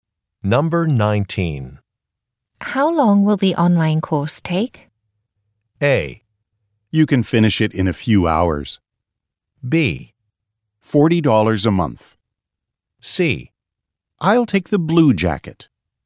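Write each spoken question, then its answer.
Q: How long will the online course take?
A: A: You can finish it in a few hours.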